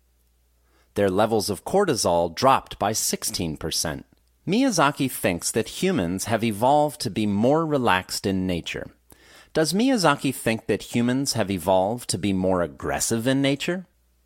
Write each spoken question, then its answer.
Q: Does Miyazaki think that humans have evolved to be more aggressive in nature?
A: No, Miyazaki doesn't think that humans have evolved to be more aggressive in nature.